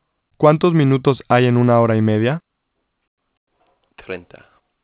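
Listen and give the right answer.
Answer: 90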